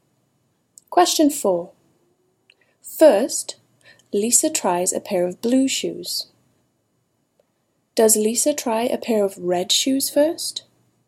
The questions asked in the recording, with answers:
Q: Does Lisa try a pair of red shoes first?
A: No. Lisa does not try a pair of red shoes.